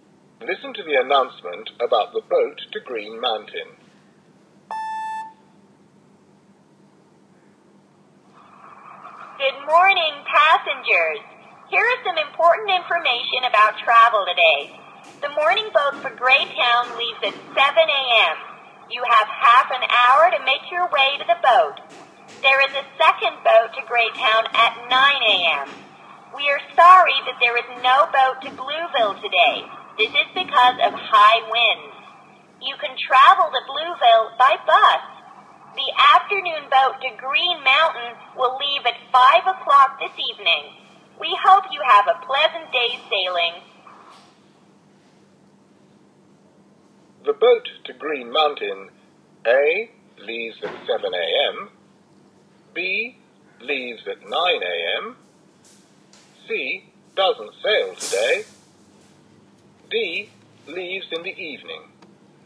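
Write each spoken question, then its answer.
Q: The boat to Green Mountain, A, leaves at 7 a.m., B, leaves at 9 a.m., C, doesn't sail today, D, leaves in the evening.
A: D: leaves in the evening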